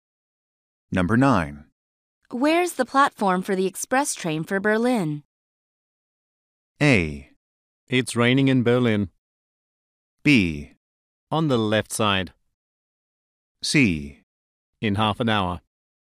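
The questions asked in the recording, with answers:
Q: Where's the platform for the express train for Berlin?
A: B: On the left side.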